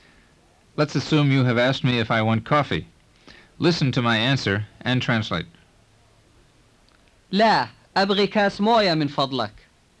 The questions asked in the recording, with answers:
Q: Listen to my answer and translate. لا, أبغي كاس موية من فضلك.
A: No, I want a glass of water, please.